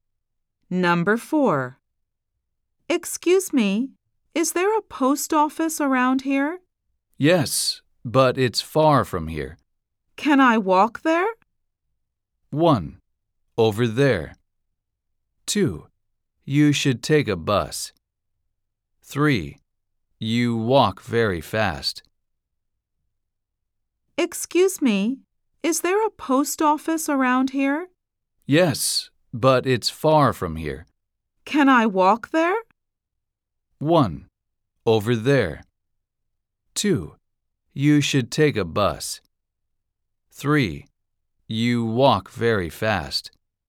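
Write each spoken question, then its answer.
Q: Can I walk there?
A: 2: You should take a bus.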